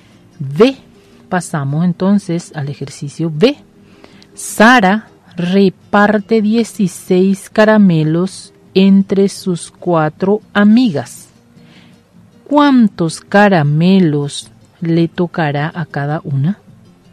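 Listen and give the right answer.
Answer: 4 caramelos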